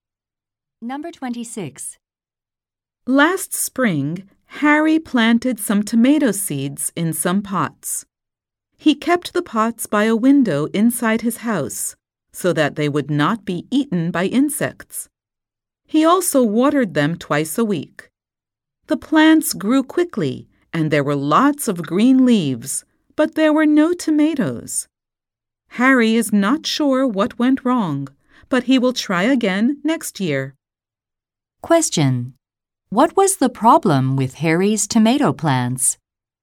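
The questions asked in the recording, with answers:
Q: What was the problem with Harry's tomato plants?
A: They produced no tomatoes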